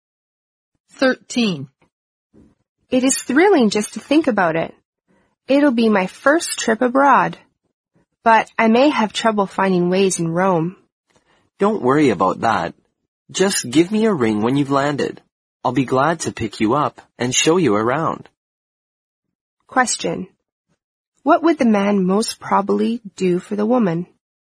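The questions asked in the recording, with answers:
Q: What would the man most probably do for the woman?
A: Pick her up and show her around Rome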